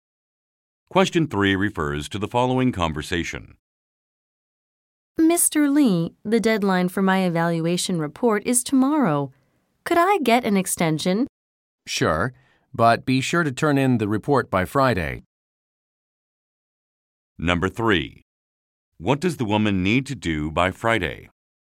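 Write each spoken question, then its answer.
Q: What does the woman need to do by Friday?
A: Turn in her evaluation report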